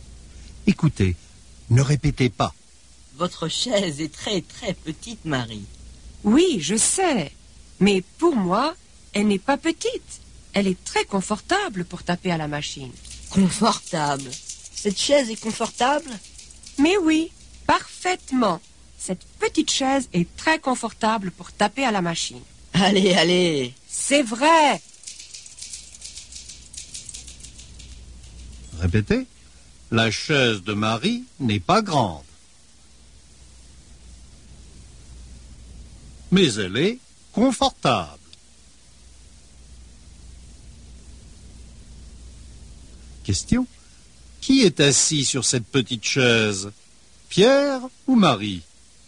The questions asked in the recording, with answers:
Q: Qui est assis sur cette petite chaise?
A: Marie est assise sur cette petite chaise.